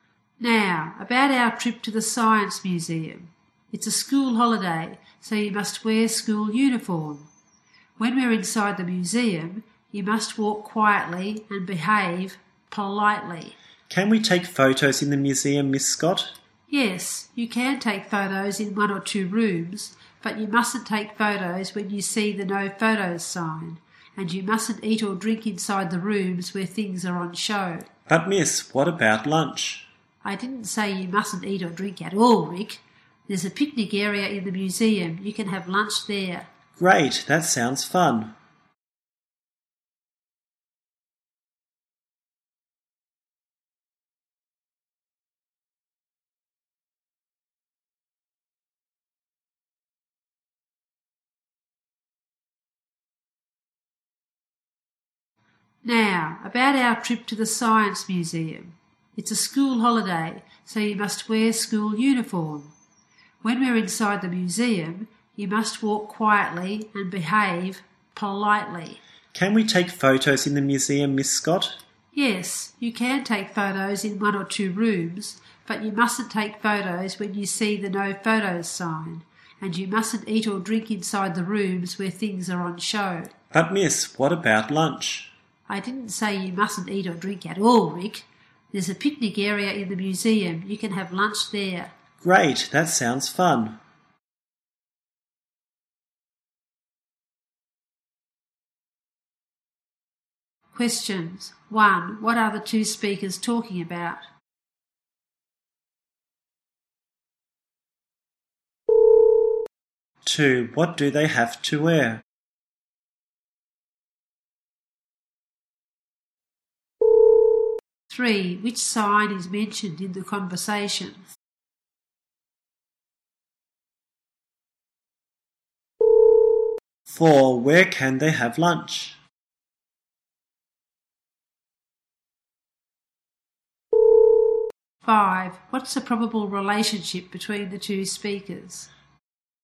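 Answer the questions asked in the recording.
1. Their trip to the Science Museum
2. School uniform
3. The no photos sign
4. In the picnic area in the museum
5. Teacher and student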